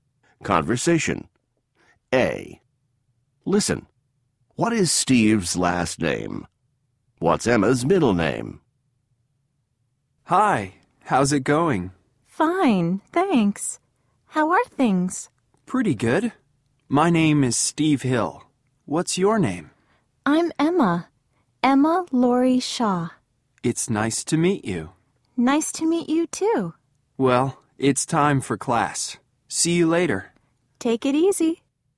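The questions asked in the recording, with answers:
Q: What is Steve's last name?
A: Hill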